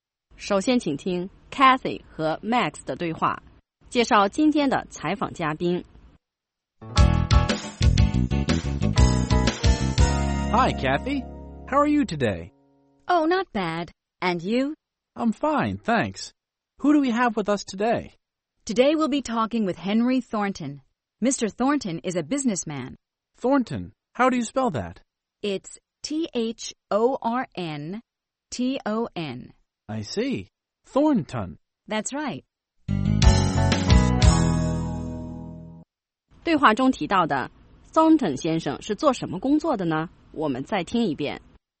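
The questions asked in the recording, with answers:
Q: 对话中提到的 Thornton 先生是做什么工作的呢?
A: 商人(businessman)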